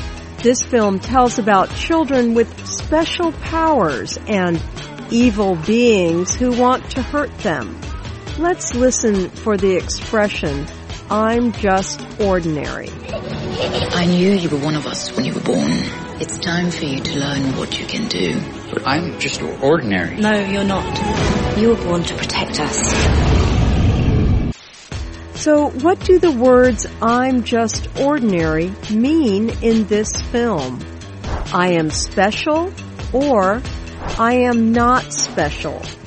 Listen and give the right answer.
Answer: I'm just ordinary means I am not special.